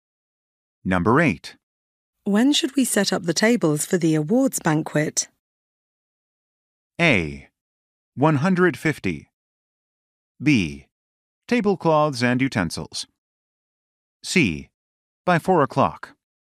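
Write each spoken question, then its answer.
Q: When should we set up the tables for the awards banquet?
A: C: By 4 o'clock.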